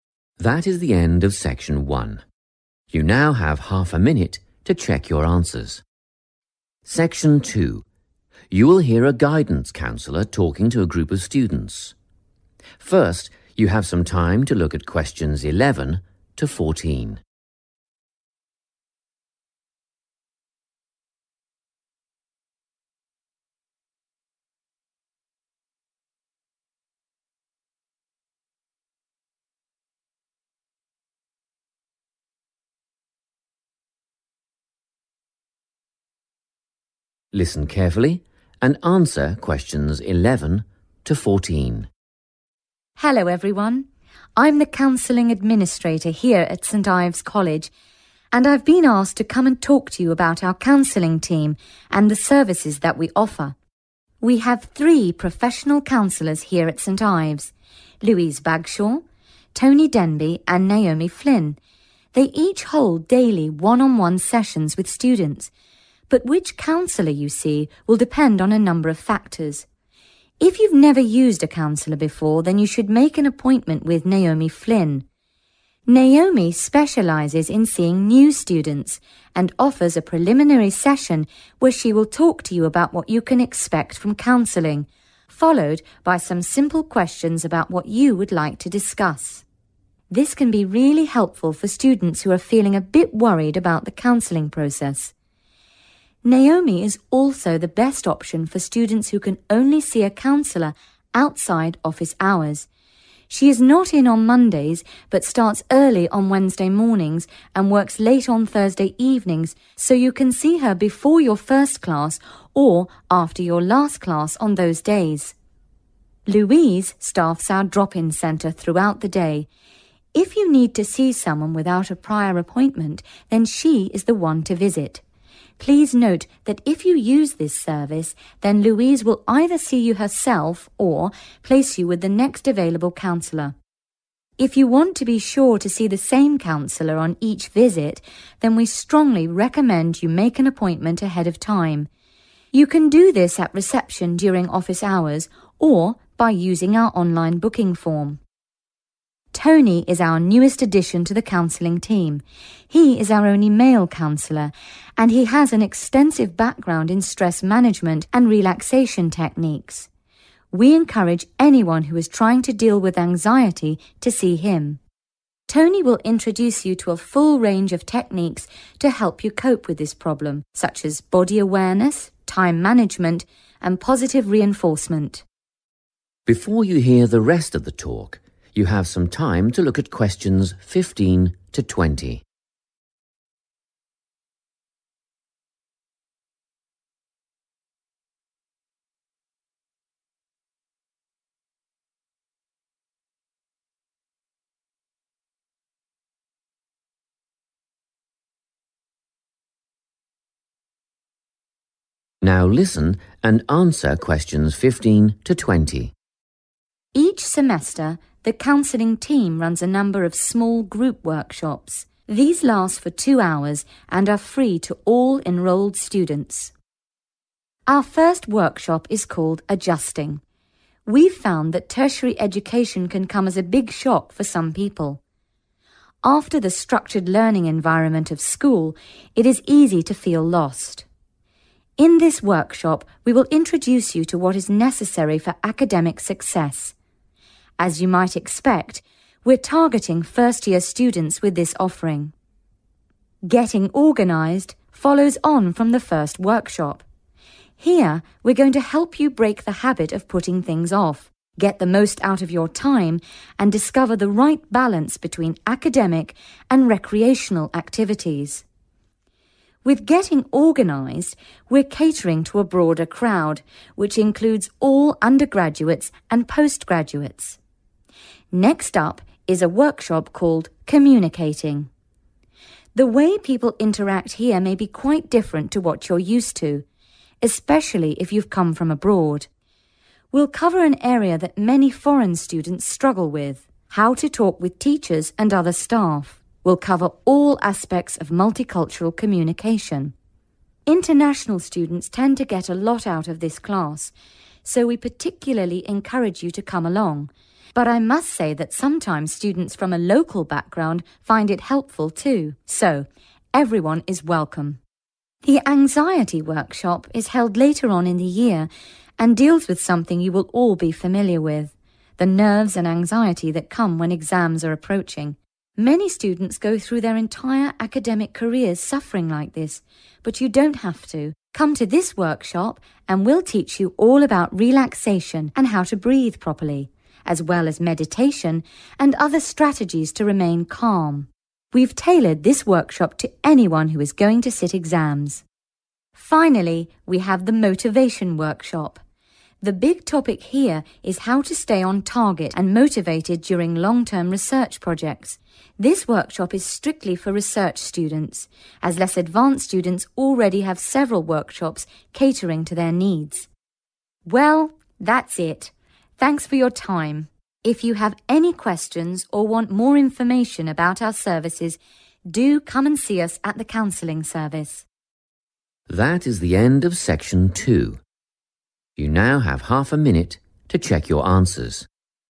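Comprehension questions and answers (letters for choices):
Which counselor should you see? Write the correct letter, A, B or C, next to questions 11–14.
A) Louise Bagshaw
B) Tony Denby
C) Naomi Flynn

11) If you do not have an appointment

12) If it is your first time seeing a counselor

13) If your concerns are related to anxiety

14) If you are unable to see a counsellor during normal office hours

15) 15................... students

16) use time effectively, find 16.......................... between study and leisure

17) all students, especially 17...................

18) 18................ , breathing techniques, meditation, etc.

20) 20.................. students only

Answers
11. A
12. C
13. B
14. C
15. first-year
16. right balance
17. international students
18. relaxation
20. research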